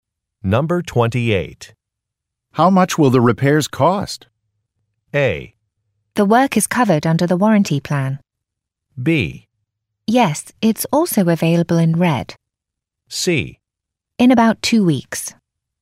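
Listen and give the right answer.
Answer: A: The work is covered under the warranty plan.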